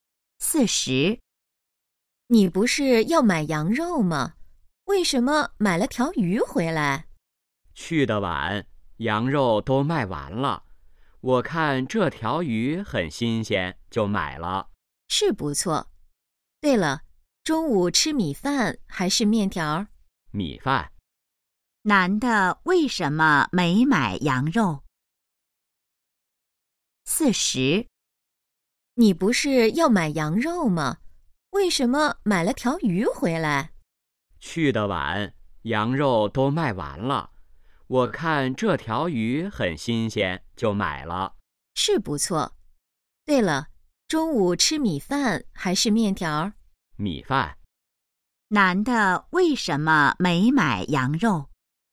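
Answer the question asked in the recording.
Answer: 羊肉卖完了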